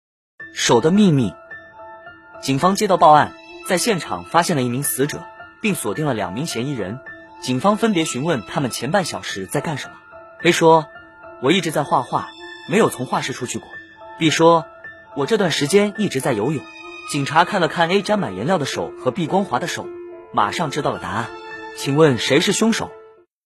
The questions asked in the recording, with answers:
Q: 请问谁是凶手?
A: 凶手是 B, 因为游泳手会泡皱,而 B 的手是光滑的,他在说谎。